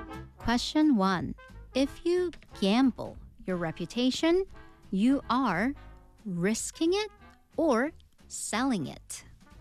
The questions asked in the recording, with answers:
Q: If you gamble your reputation, you are risking it or selling it?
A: risking it, not selling it.